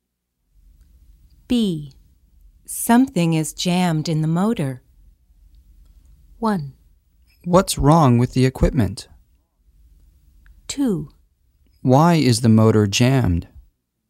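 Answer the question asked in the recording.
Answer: 1: What's wrong with the equipment?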